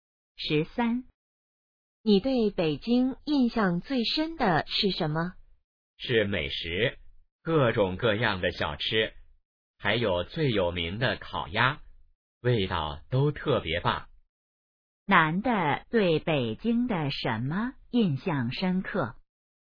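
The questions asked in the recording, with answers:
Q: 男的对北京的什么印象深刻?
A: 美食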